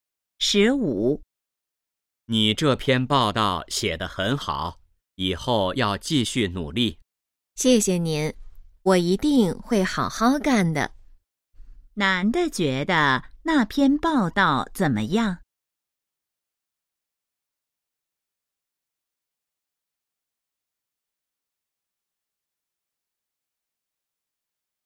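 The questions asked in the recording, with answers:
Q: 男的觉得那篇报道怎么样?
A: 写得很好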